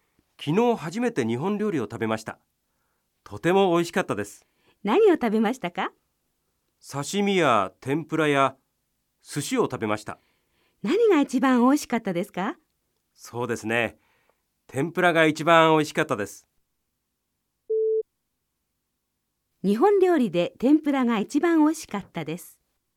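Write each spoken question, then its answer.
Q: 日本料理で天ぷらが一番美味しかったです。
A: ○(正しい)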